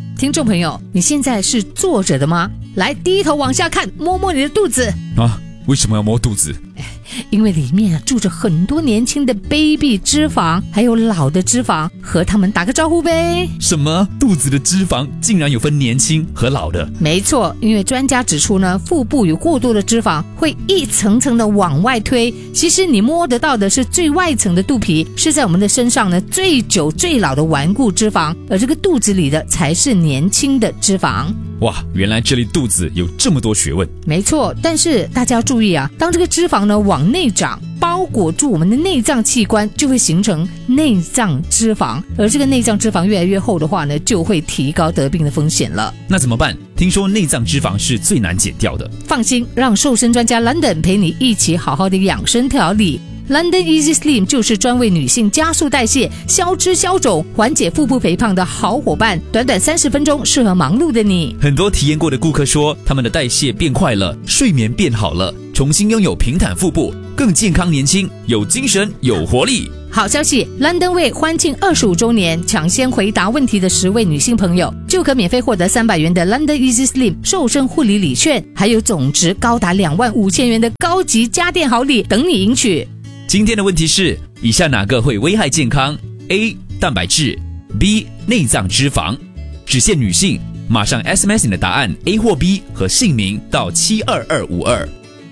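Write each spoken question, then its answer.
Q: 今天的问题是,以下哪个会危害健康? A. 蛋白质, B. 内脏脂肪。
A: B: 内脏脂肪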